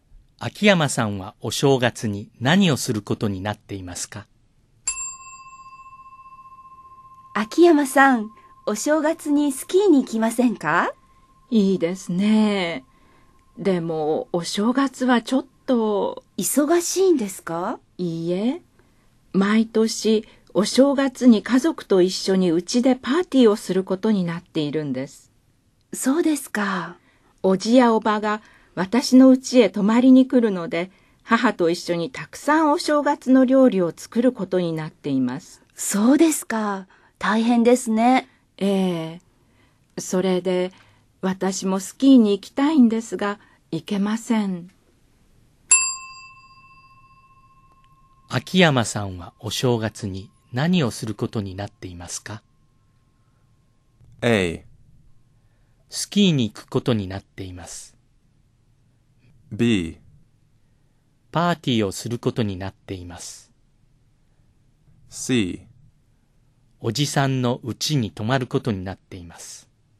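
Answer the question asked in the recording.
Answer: B: パーティーをすることになっています。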